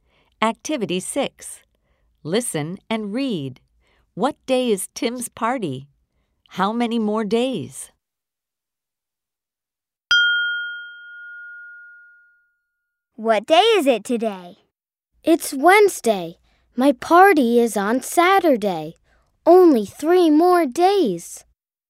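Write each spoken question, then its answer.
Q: What day is Tim's party?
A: Saturday

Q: How many more days?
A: 3 more days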